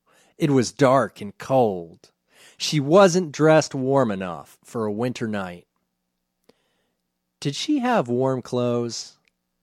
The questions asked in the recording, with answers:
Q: Did she have warm clothes?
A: No, she wasn't dressed warm enough.